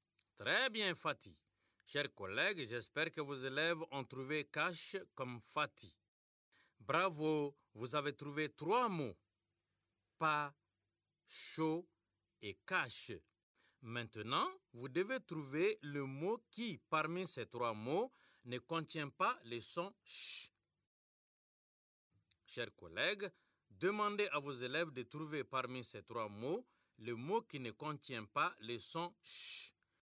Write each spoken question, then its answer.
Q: Chers collègues, demandez à vos élèves de trouver parmi ces trois mots le mot qui ne contient pas le son « ch ».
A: C'est le mot pas.